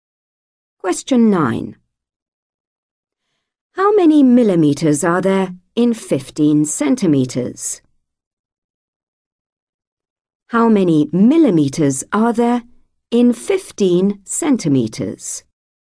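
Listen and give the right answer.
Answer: 150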